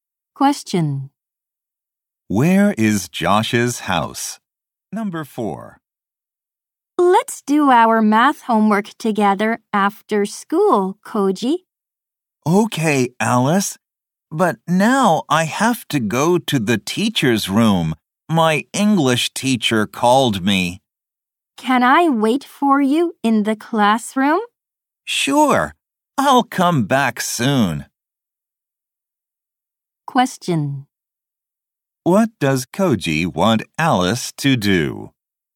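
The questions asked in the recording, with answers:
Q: What does Koji want Alice to do?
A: To wait for him in the classroom.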